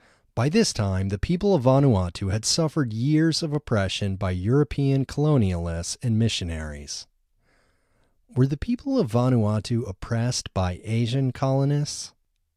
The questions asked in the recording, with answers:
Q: Were the people of Vanuatu oppressed by Asian colonists?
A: No, they weren't oppressed by Asian colonists, they were oppressed by European colonists.